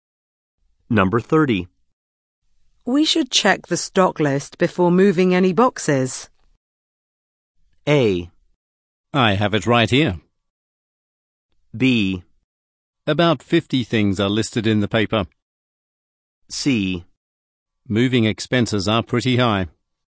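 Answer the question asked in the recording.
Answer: A: I have it right here.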